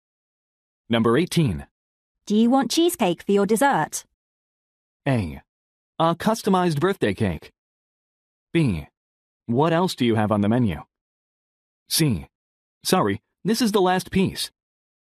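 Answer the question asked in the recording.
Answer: B: What else do you have on the menu?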